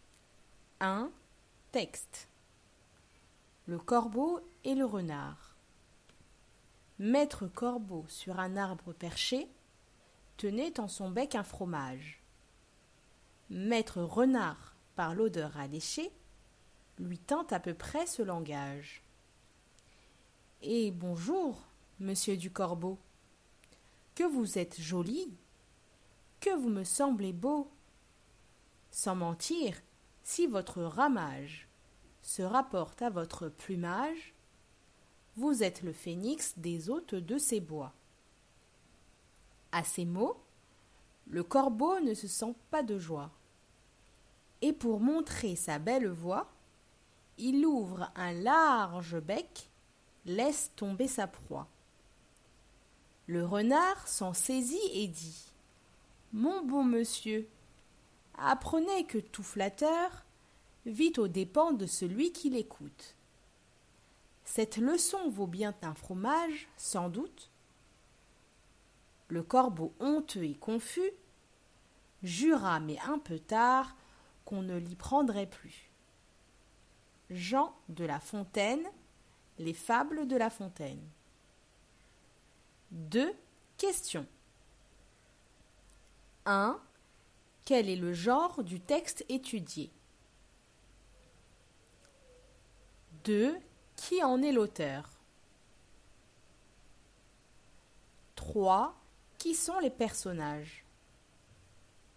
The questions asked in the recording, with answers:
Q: Quel est le genre du texte étudié?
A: C'est une fable.

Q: Qui en est l'auteur?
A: Jean de La Fontaine.

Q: Qui sont les personnages?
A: Le corbeau et le renard.